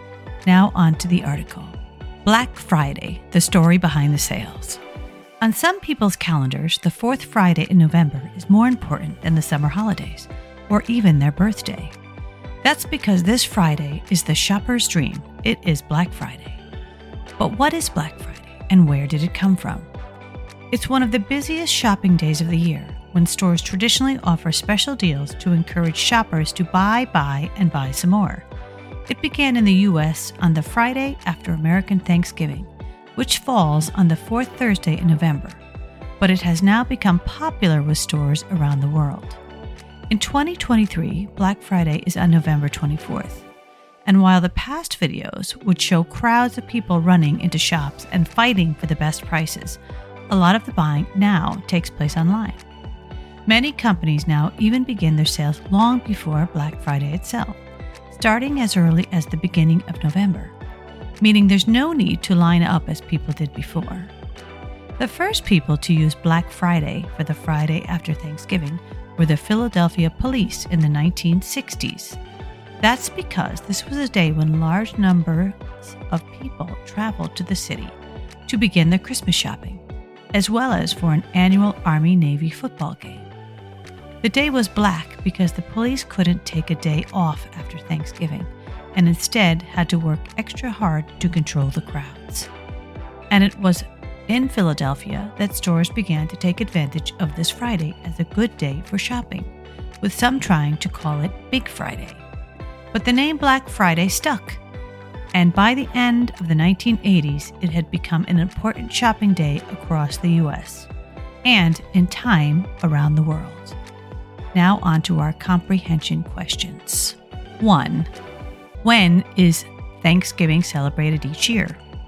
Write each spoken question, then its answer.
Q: When is Thanksgiving celebrated each year?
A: the fourth Thursday in November.